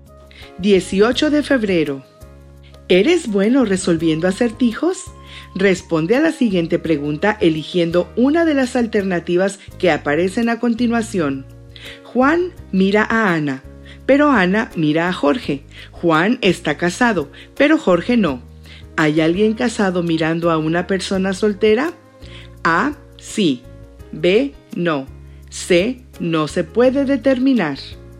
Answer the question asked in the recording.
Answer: Pero siguiendo la lógica, si estuviera casada, la letra A sería la correcta, porque está mirando a Jorge que no está casado.